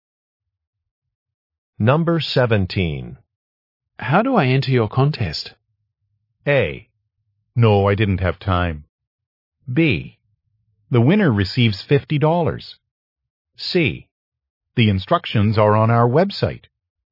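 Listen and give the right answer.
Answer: C: The instructions are on our website.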